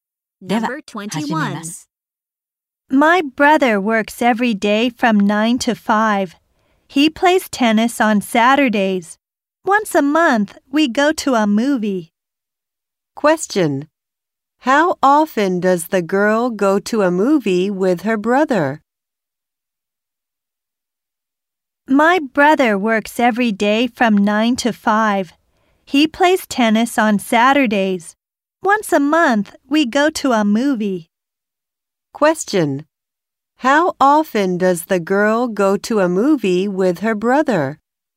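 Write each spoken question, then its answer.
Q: How often does the girl go to a movie with her brother?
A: Once a month.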